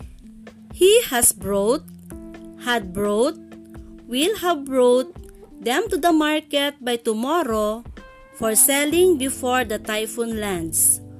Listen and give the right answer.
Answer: Yes, the answer is will have brought.